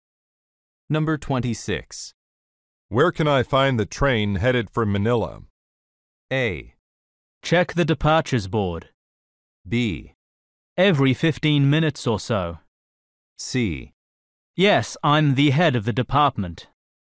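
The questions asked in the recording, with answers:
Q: Where can I find the train headed for Manila?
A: A: Check the departures board.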